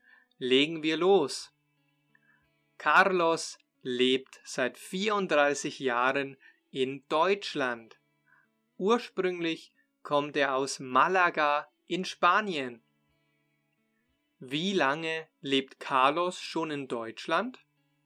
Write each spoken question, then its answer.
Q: Wie lange lebt Carlos schon in Deutschland?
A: Seit 34 Jahren. Er lebt seit 34 Jahren in Deutschland.